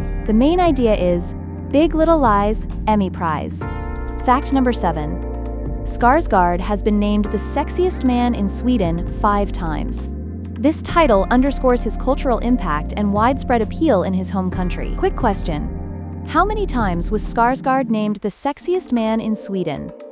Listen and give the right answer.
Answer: Correct answer, 5.